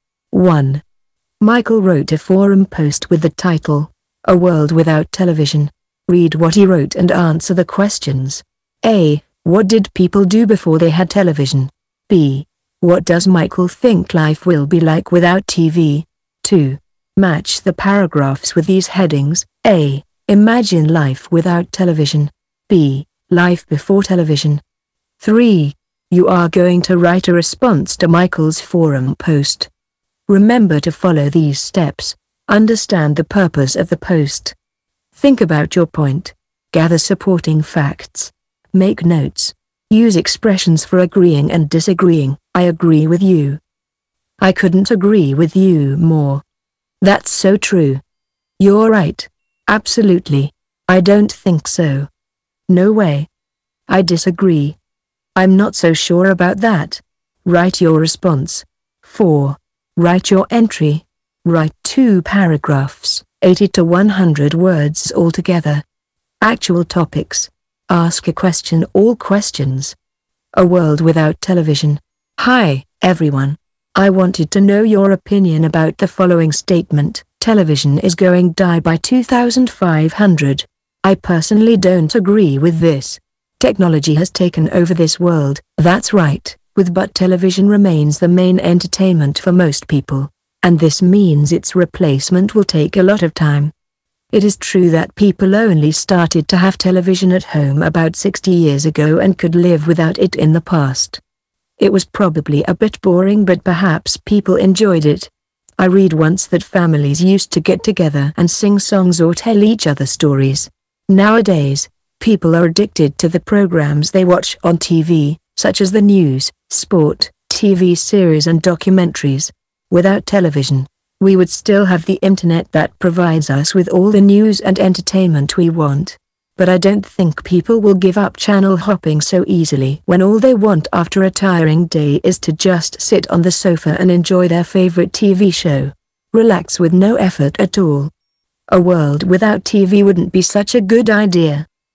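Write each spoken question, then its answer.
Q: What did people do before they had television?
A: Families got together and sang songs or told each other stories.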